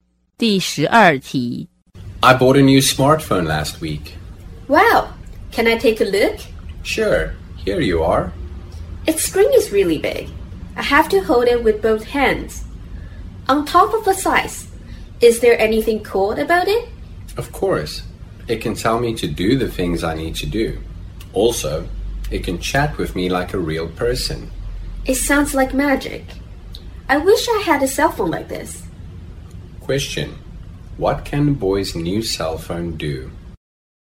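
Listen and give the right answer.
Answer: Remind him of things to do and chat with him like a real person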